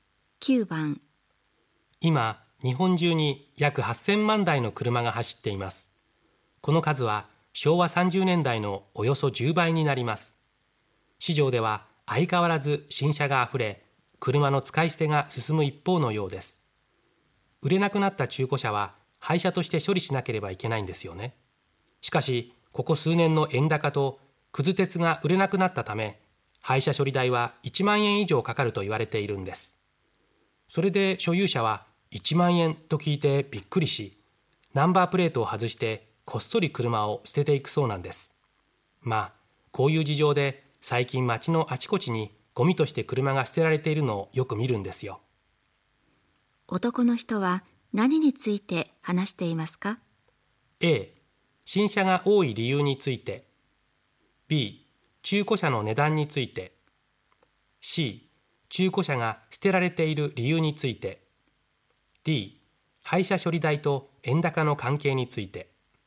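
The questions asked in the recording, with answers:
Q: 男の人は何について話していますか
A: C: 中古車が捨てられている理由について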